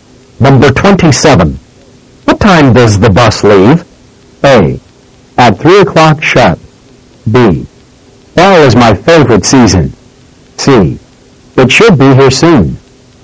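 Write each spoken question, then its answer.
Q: What time does the bus leave?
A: A: At 3 o'clock sharp.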